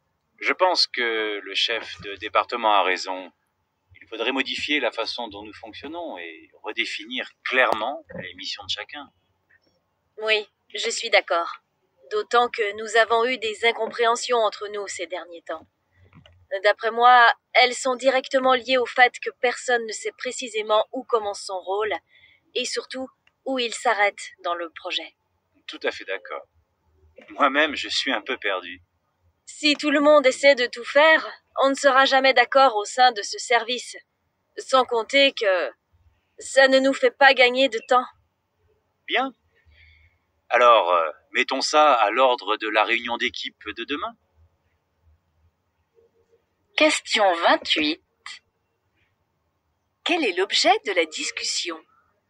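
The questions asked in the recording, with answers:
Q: Quel est l'objet de la discussion?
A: La nécessité de réorganiser le fonctionnement du service et de redéfinir clairement le rôle de chacun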